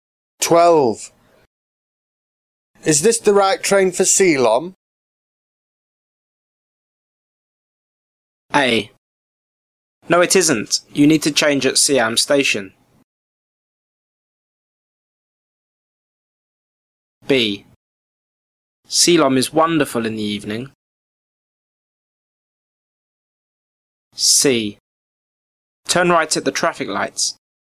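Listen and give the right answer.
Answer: A: No, it isn't. You need to change at Siam Station.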